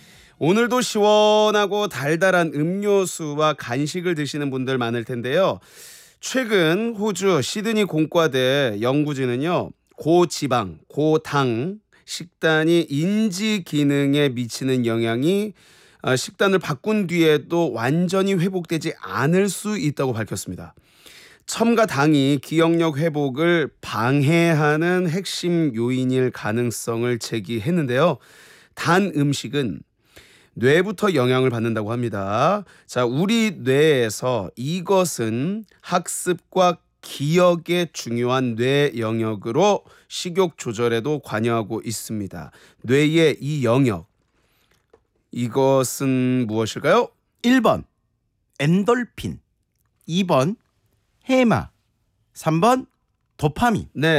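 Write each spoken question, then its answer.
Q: 뇌의 이 영역, 이것은 무엇일까요?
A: 2번: 해마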